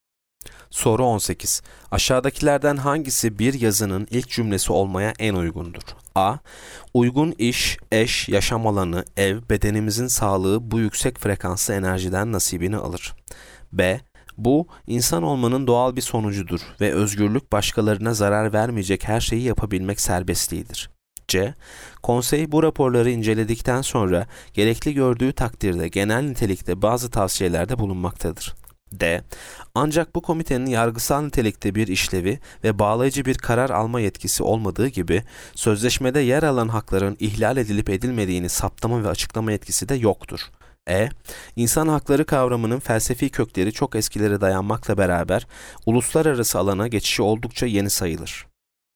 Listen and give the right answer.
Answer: Yanıt E. İnsan hakları kavramının felsefi kökleri çok eskilere dayanmakla beraber uluslararası alana geçişi oldukça yeni sayılır.